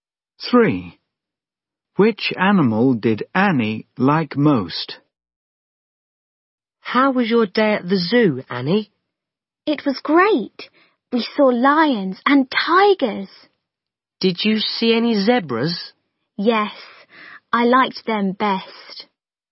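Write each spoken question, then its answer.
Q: Which animal did Annie like most?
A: Zebras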